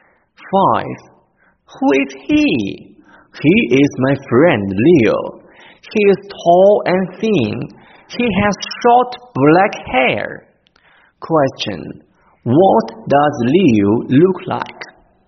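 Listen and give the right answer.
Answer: He is tall and thin with short black hair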